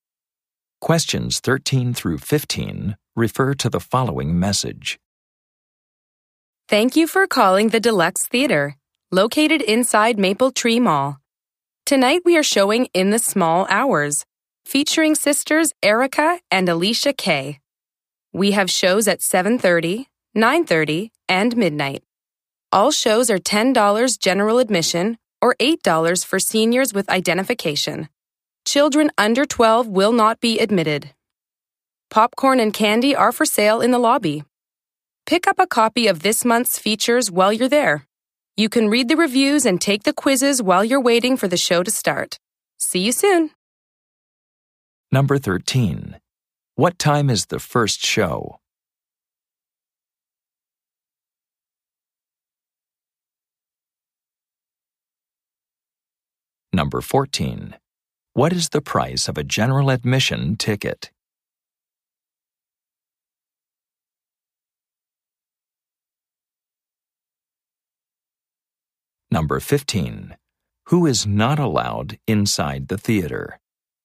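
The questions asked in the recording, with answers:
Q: What time is the first show?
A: 7:30

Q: What is the price of a general admission ticket?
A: $10

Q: Who is not allowed inside the theater?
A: Children under 12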